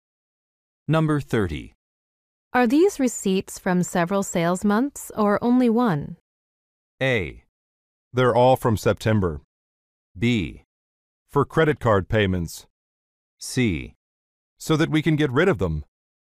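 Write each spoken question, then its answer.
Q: Are these receipts from several sales months or only one?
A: A: They're all from September.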